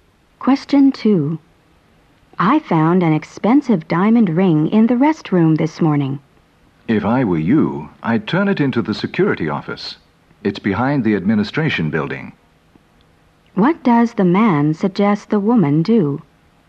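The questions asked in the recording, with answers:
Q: What does the man suggest the woman do?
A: Take the ring to the security office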